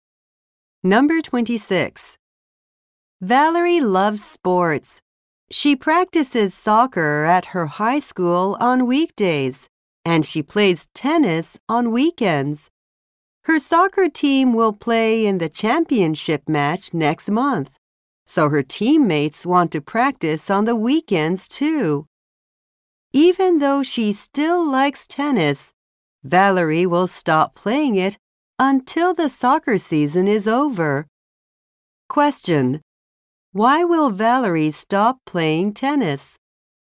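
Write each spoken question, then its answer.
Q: Why will Valerie stop playing tennis?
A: Her soccer team wants to practice on weekends for the championship.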